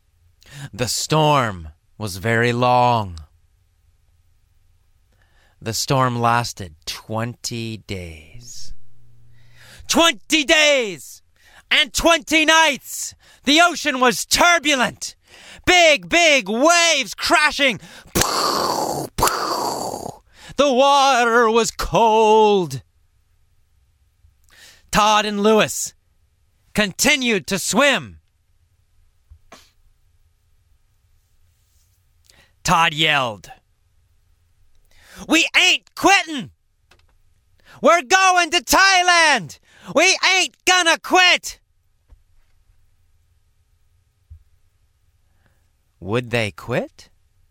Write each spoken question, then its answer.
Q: Would they quit?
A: No, they would not quit.